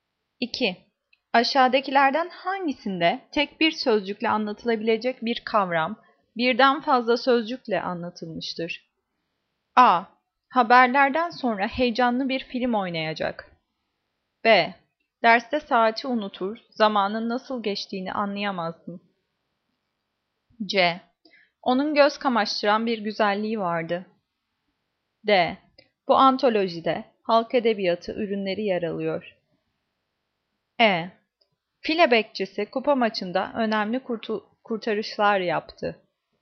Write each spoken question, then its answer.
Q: Aşağıdakilerden hangisinde tek bir sözcükle anlatılabilecek bir kavram birden fazla sözcükle anlatılmıştır?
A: Cevap E. File bekçisi kupa maçında önemli kurtarışlar yaptı.